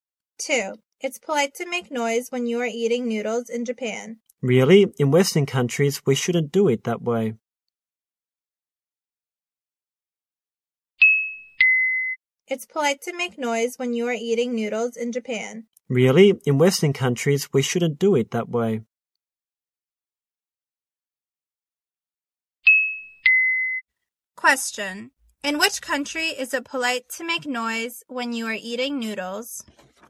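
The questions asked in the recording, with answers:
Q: In which country is it polite to make noise when you are eating noodles?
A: Japan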